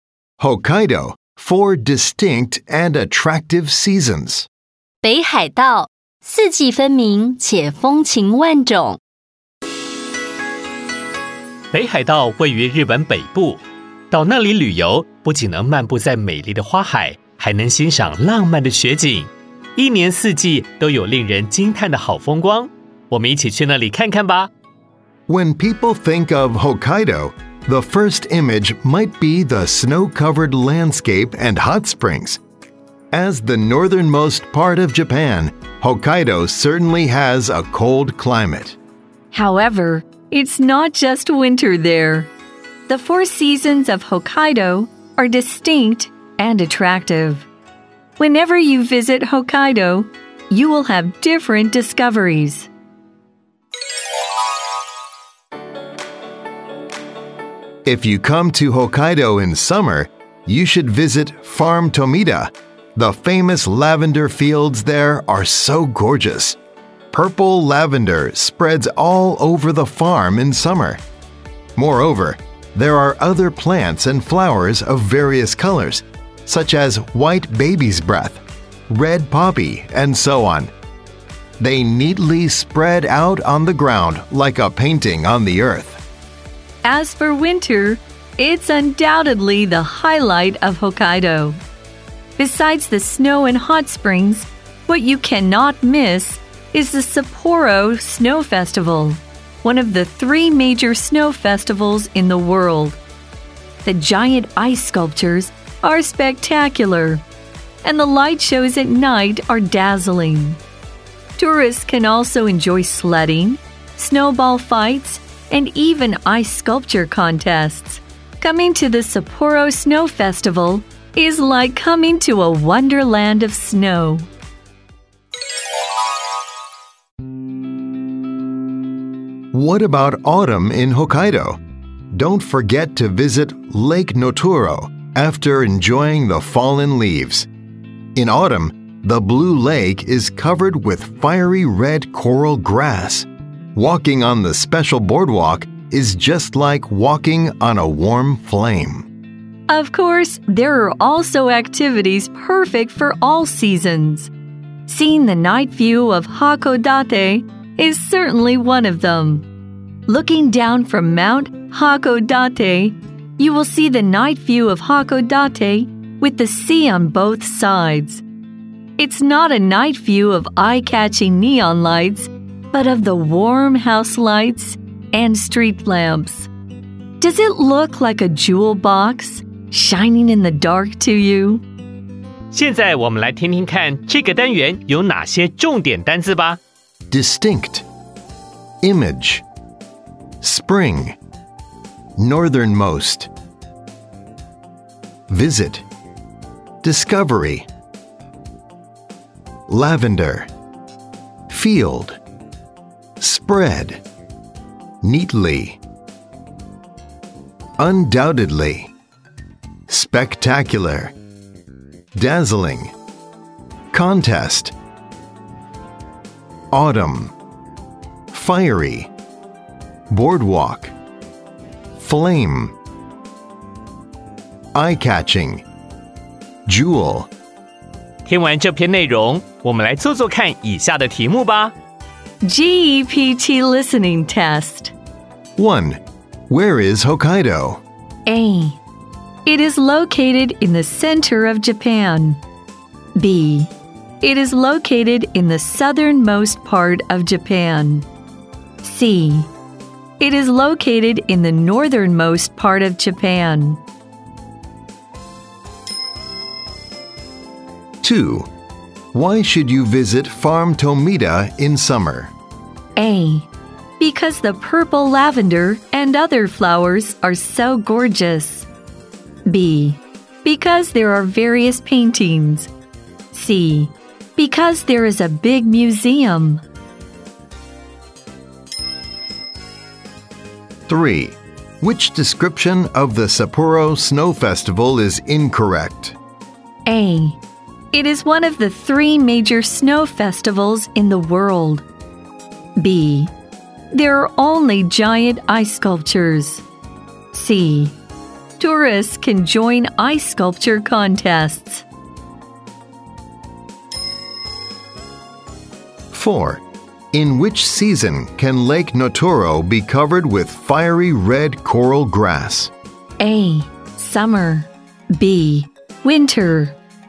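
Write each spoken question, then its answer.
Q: Where is Hokkaido?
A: C: It is located in the northernmost part of Japan.

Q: Why should you visit Farm Tomita in summer?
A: A: Because the purple lavender and other flowers are so gorgeous.

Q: Which description of the Sapporo Snow Festival is incorrect?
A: B: There are only giant ice sculptures.

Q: In which season can Lake Notoro be covered with fiery red coral grass?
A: C: Autumn.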